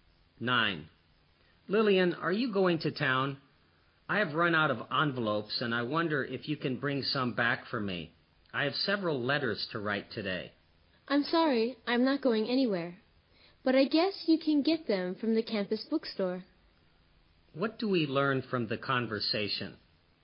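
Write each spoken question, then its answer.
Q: What do we learn from the conversation?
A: Lillian isn't going to town, so the man can buy envelopes at the campus bookstore.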